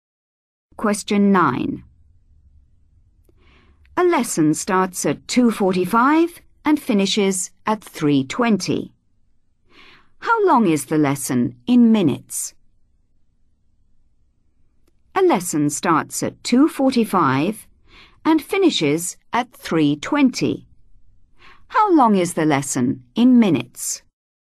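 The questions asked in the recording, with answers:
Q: How long is the lesson in minutes?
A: 35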